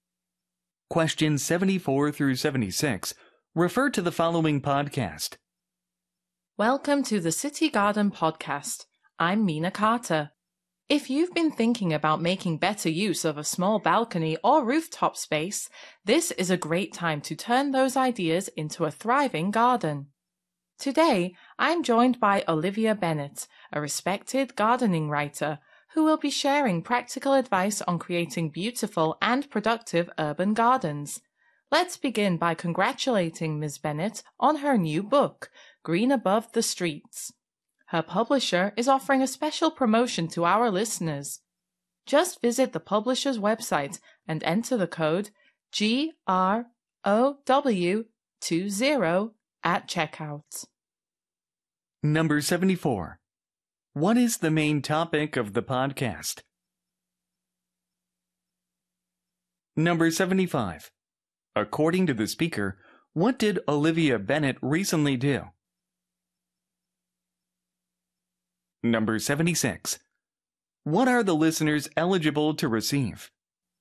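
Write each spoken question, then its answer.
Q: What is the main topic of the podcast?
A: Urban gardening

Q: According to the speaker, what did Olivia Bennett recently do?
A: Published a new book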